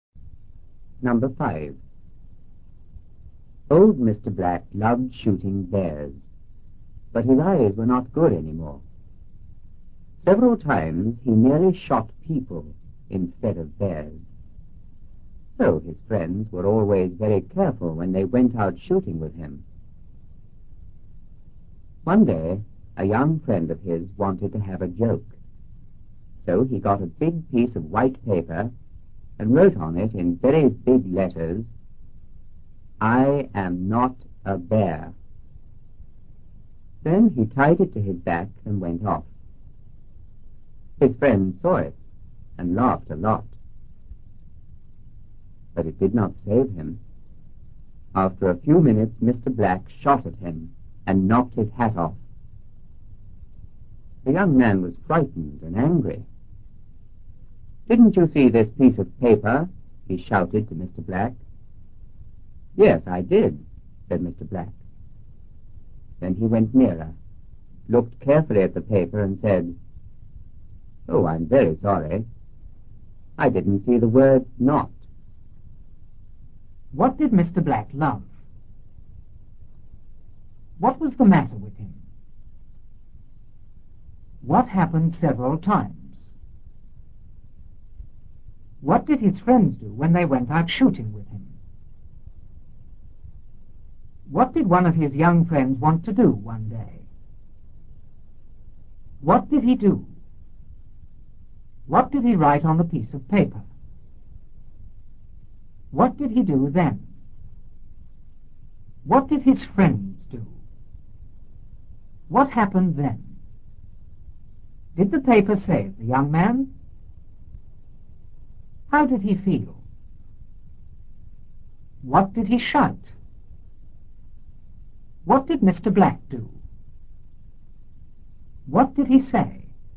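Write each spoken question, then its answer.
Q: What did Mr. Black love?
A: Shooting bears

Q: What was the matter with him?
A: His eyes were not good anymore

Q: What happened several times?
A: He nearly shot people instead of bears

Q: What did his friends do when they went out shooting with him?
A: They were always very careful

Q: What did one of his young friends want to do one day?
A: Have a joke

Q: What did he do?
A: He got a big piece of white paper and wrote on it

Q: What did he write on the piece of paper?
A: "I am not a bear."

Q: What did he do then?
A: Tied it to his back and went off

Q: What did his friends do?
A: They saw it and laughed a lot

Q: What happened then?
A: Mr. Black shot at him and knocked his hat off

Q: Did the paper save the young man?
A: No

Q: How did he feel?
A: Frightened and angry

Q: What did he shout?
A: "Didn't you see this piece of paper?"

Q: What did Mr. 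Black do?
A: He went nearer and looked carefully at the paper

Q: What did he say?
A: "Oh, I'm very sorry. I didn't see the word not."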